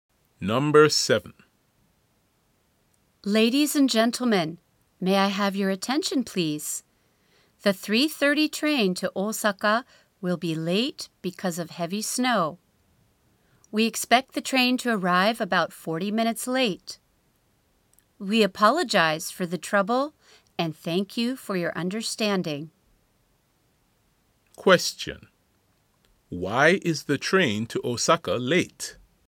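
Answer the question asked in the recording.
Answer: Because of heavy snow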